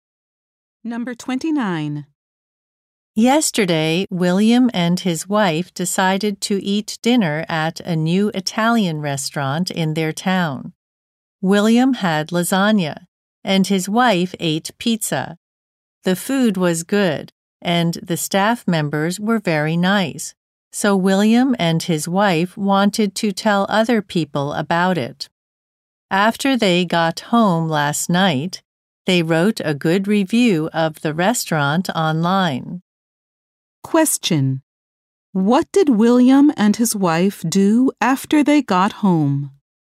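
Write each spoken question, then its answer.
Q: What did William and his wife do after they got home?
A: They wrote a good online review of the restaurant.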